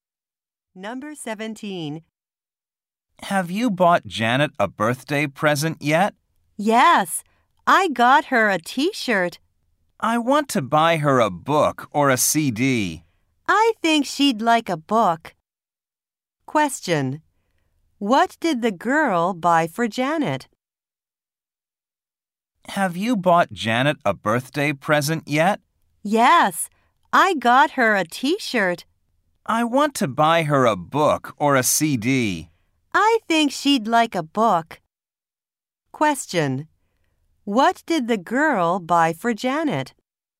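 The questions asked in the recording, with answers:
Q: What did the girl buy for Janet?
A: A T-shirt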